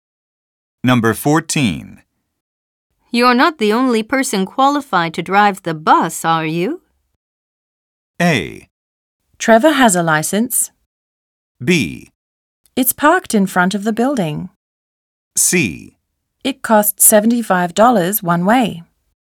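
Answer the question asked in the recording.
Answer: A: Trevor has a license.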